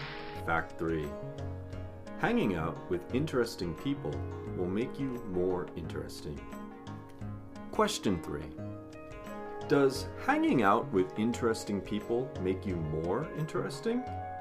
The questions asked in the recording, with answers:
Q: Does hanging out with interesting people make you more interesting?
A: Hanging out with interesting people does make you more interesting.